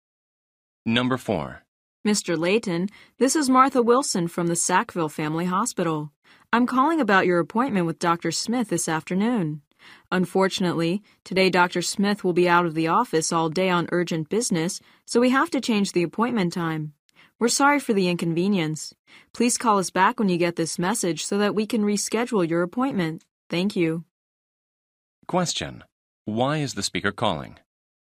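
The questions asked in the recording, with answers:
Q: Why is the speaker calling?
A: To reschedule Mr. Layton's appointment because Dr. Smith is away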